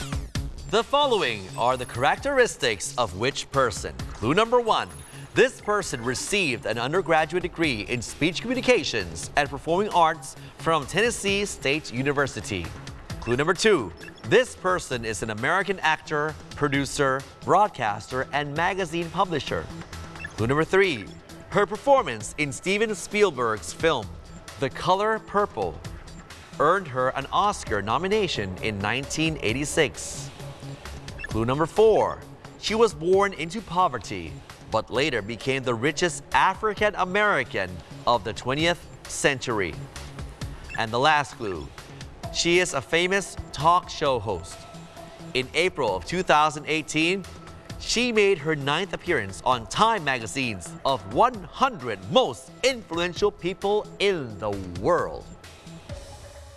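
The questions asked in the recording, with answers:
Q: The following are the characteristics of which person?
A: Oprah Winfrey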